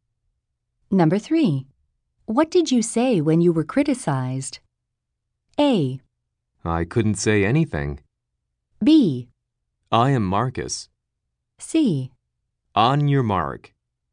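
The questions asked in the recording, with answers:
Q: What did you say when you were criticized?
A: A: I couldn't say anything.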